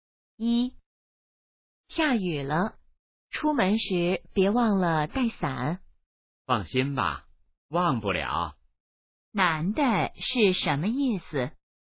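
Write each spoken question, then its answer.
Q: 男的是什么意思?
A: 他不会忘记带伞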